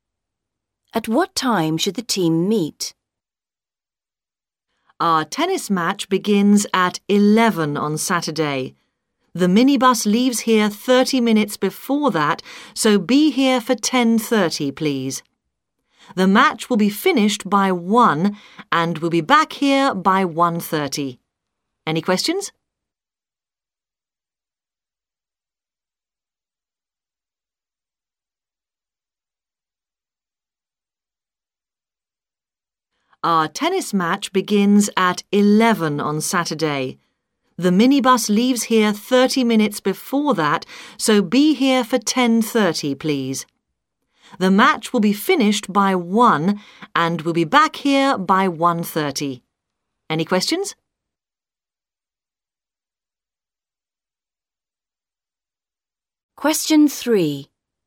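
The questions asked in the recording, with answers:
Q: At what time should the team meet?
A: 10:30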